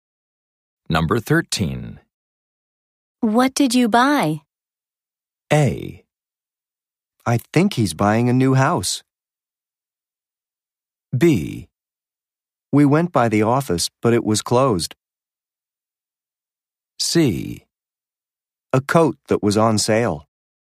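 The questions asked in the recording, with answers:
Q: What did you buy?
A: C: A coat that was on sale.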